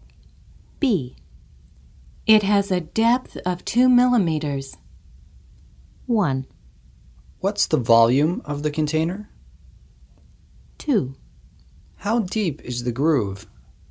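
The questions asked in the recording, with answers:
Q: It has a depth of 2 millimeters.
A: 2: How deep is the groove?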